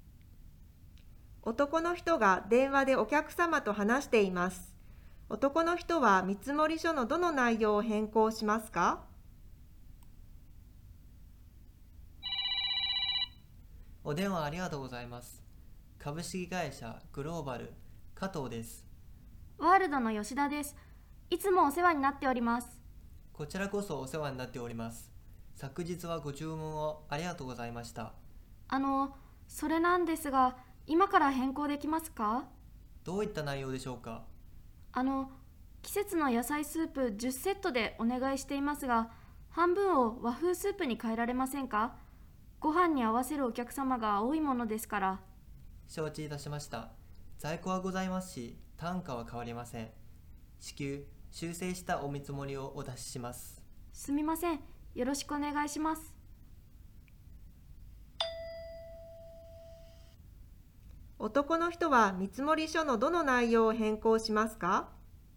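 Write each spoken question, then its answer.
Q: 男の人は見積書のどの内容を変更しますか?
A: 商品の内容(季節の野菜スープ10セットのうち半分を和風スープに変える)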